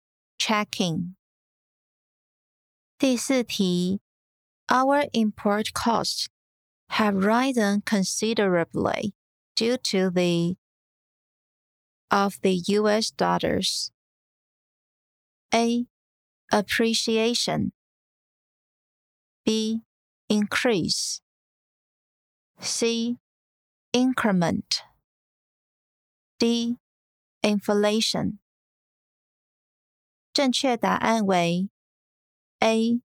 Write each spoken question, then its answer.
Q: Our import costs have risen considerably due to the of the US dollars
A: 正确答案为 A.